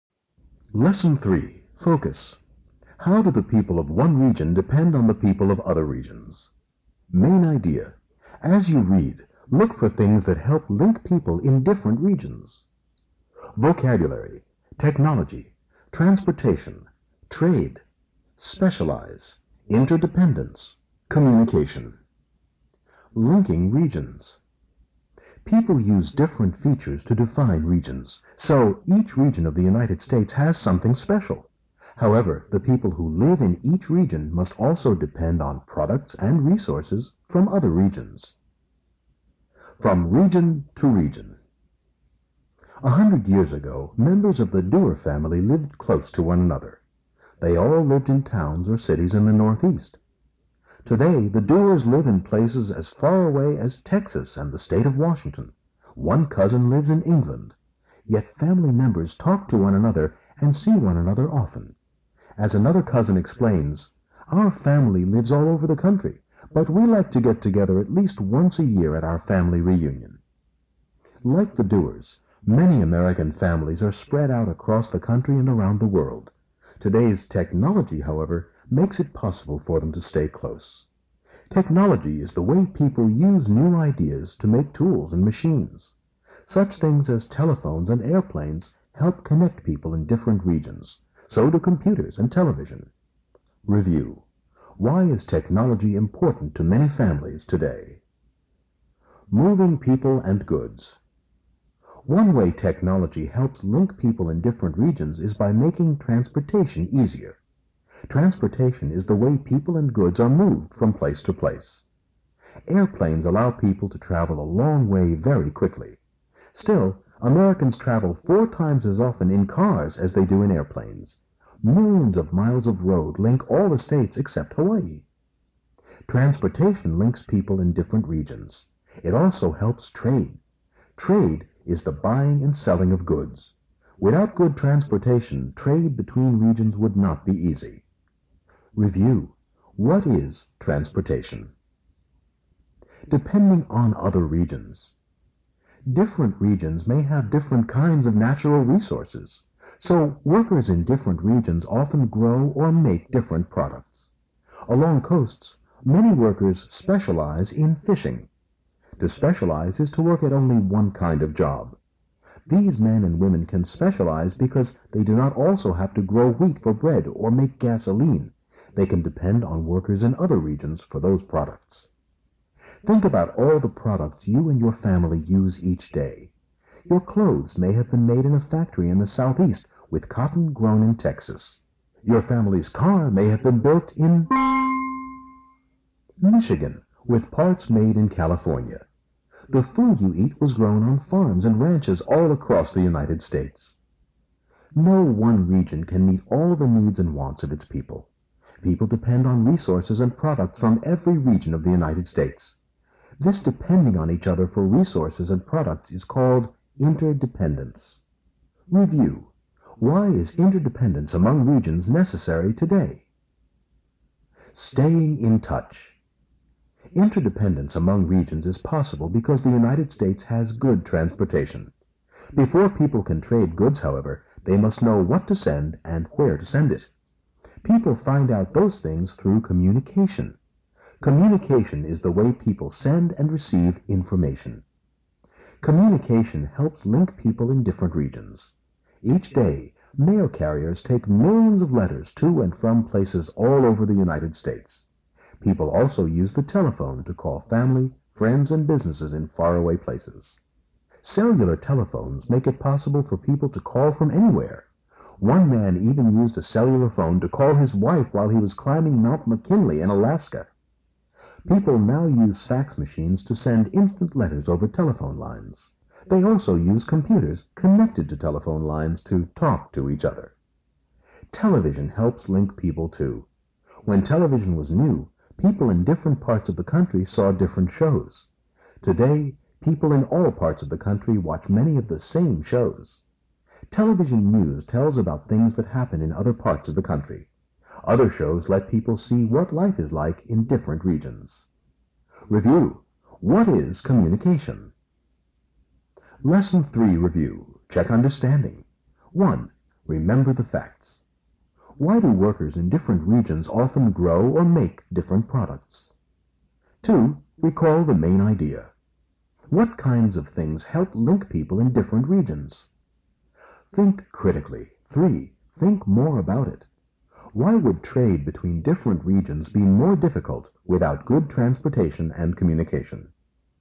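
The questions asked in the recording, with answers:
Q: Why is technology important to many families today?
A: It helps family members who live far apart in different regions stay close and connected.

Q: What is transportation?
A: The way people and goods are moved from place to place

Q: Why is interdependence among regions necessary today?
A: No one region can meet all the needs and wants of its people.

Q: What is communication?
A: The way people send and receive information

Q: Why do workers in different regions often grow or make different products?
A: Different regions have different kinds of natural resources.

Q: What kinds of things help link people in different regions?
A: Technology, transportation and communication

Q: Why would trade between different regions be more difficult without good transportation and communication?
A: Goods could not be moved easily, and people would not know what to send or where to send it.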